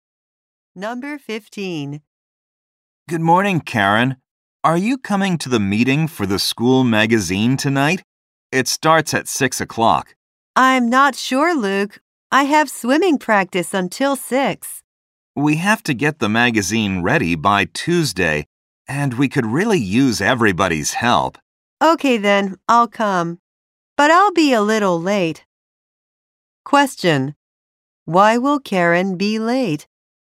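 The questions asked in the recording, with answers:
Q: Why will Karen be late?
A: She has swimming practice until 6.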